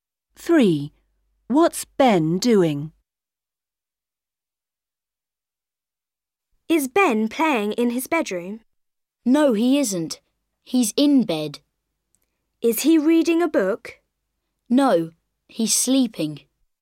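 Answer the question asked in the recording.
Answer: sleeping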